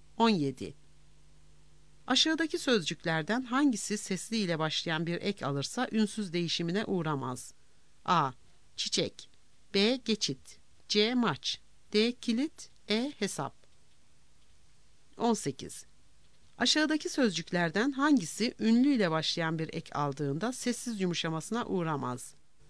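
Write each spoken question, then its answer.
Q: Aşağıdaki sözcüklerden hangisi sesli ile başlayan bir ek alırsa ünsüz değişimine uğramaz?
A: C: Maç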